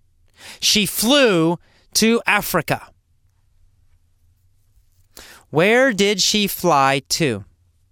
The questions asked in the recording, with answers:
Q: Where did she fly to?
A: To Africa. She flew to Africa.